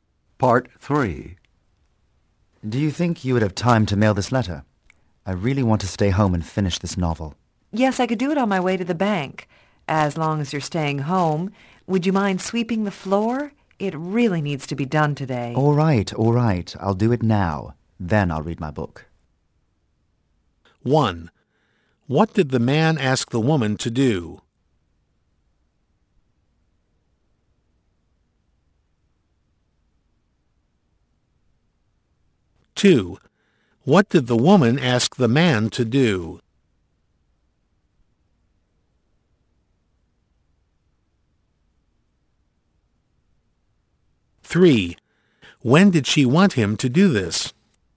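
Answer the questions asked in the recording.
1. Mail a letter
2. Sweep the floor
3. Today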